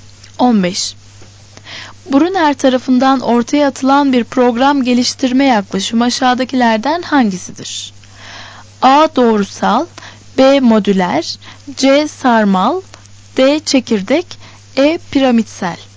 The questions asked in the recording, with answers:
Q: Brunner tarafından ortaya atılan bir program geliştirme yaklaşımı aşağıdakilerden hangisidir?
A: Doğru cevap C.